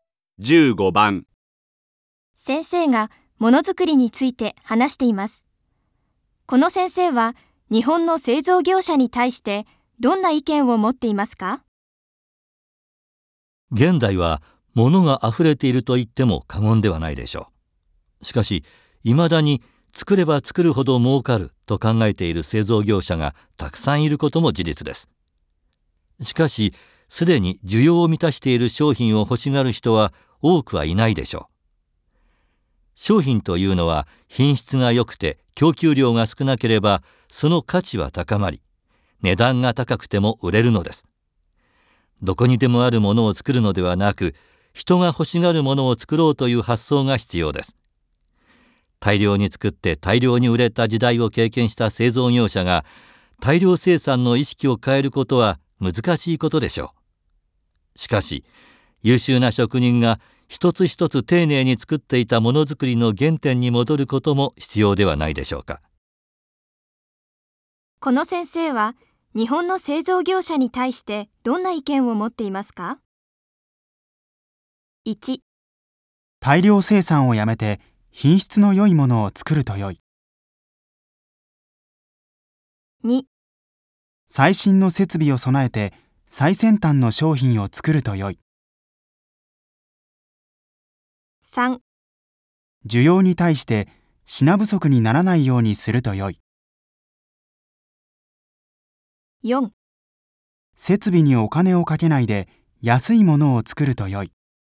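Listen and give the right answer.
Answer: 1: 大量生産をやめて品質の良いものを作ると良い。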